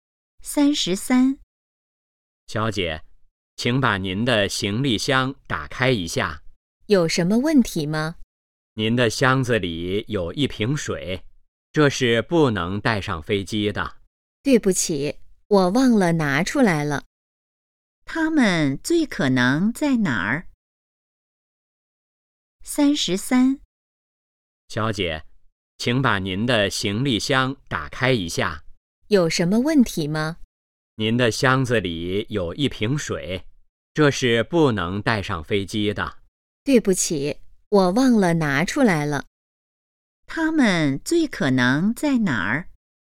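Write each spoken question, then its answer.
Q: 他们最可能在哪儿?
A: 机场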